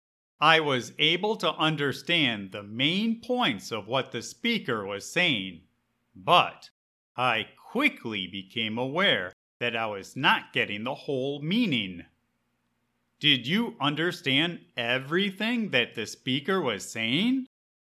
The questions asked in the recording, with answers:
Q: Did you understand everything that the speaker was saying?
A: Not exactly. I was able to understand the main points, but it quickly became obvious that I was missing something.